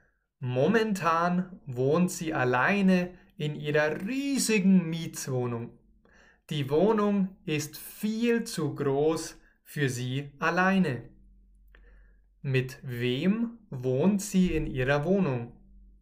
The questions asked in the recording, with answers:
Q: Mit wem wohnt sie in ihrer Wohnung?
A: Mit niemandem. Sie wohnt alleine in ihrer Wohnung.